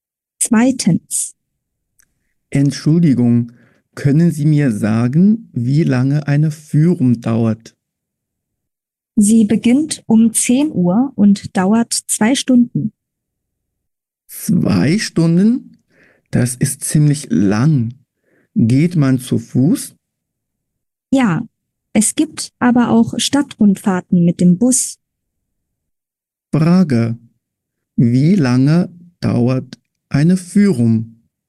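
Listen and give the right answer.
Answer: 2 Stunden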